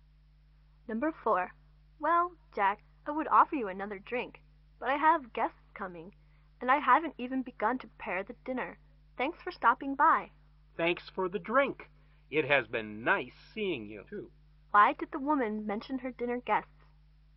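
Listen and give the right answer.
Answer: To politely tell Jack it was time to leave.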